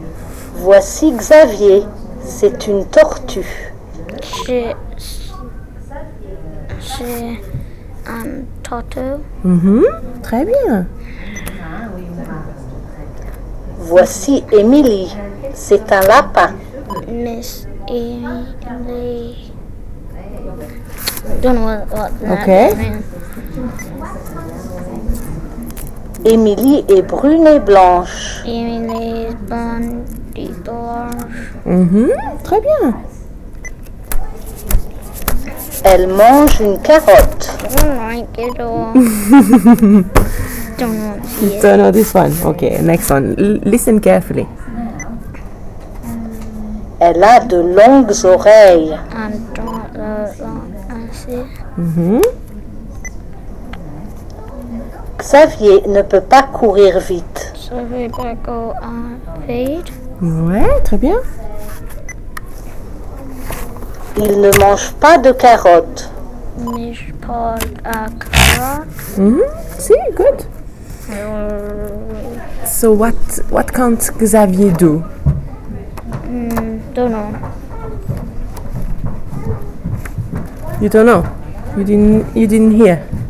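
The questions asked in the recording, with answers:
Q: So what can't Xavier do?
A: Run fast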